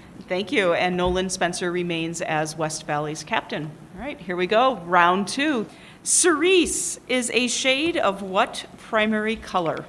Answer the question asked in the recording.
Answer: That is correct.